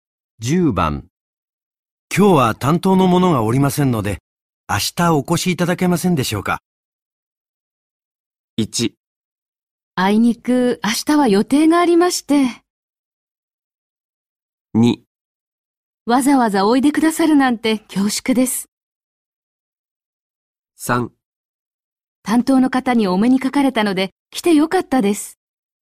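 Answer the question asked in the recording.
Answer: 1: あいにく明日は予定がありまして、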